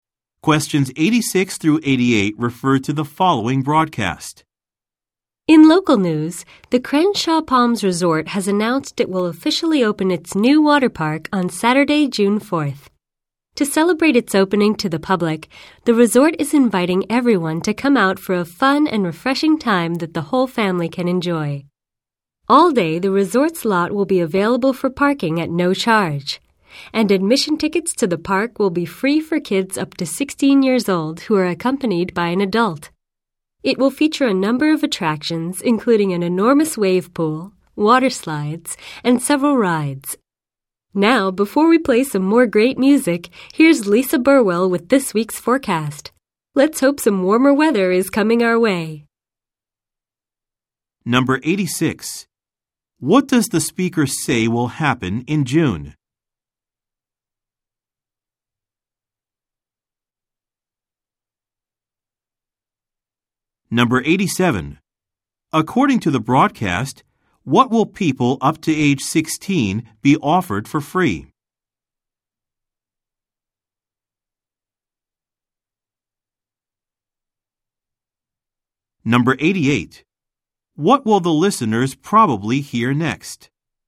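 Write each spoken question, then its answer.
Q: What does the speaker say will happen in June?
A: The resort's new water park will open

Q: According to the broadcast, what will people up to age 16 be offered for free?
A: Admission tickets to the water park

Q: What will the listeners probably hear next?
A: A weather forecast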